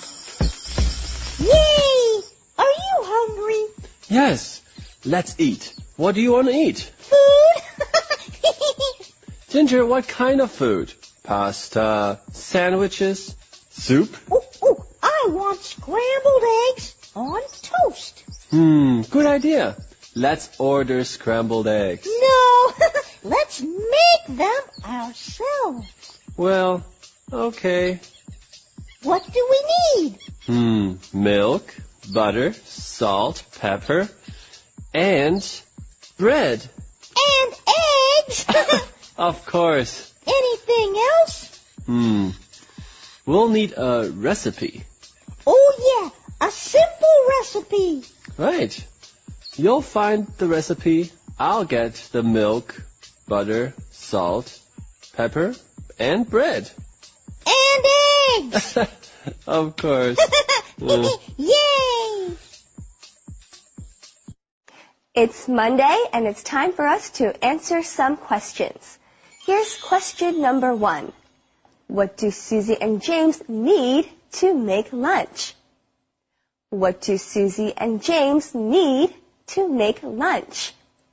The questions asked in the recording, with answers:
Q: What do Susie and James need to make lunch?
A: Susie and James need eggs, milk, butter, salt, pepper, and bread.